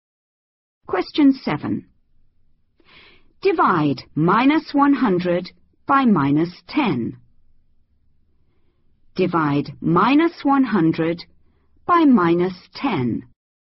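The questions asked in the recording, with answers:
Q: Divide -100 by -10.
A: 10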